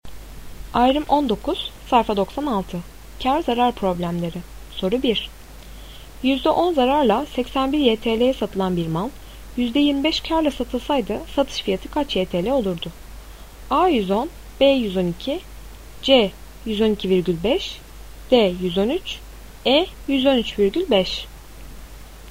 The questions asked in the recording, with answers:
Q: %10 zararla 81 YTL'ye satılan bir mal, %25 karla satılsaydı satış fiyatı kaç YTL olurdu?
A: Doğru cevap C 112,5.